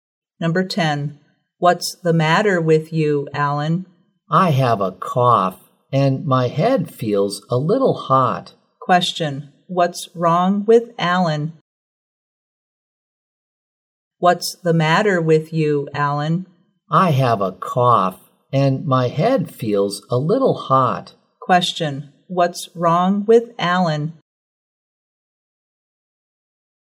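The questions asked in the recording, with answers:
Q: What's wrong with Alan?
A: He has a cough and a slight fever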